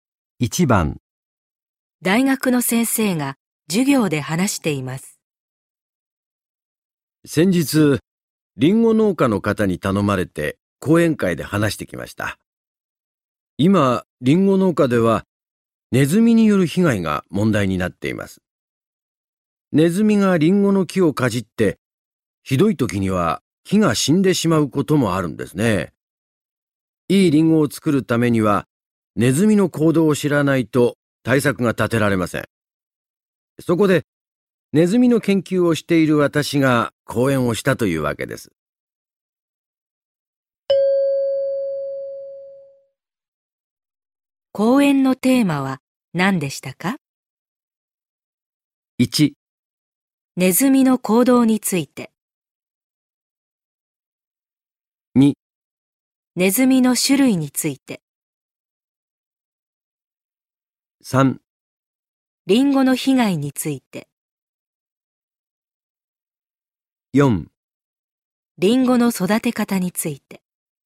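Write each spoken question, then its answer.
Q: 講演のテーマは何でしたか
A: 1: ネズミの行動について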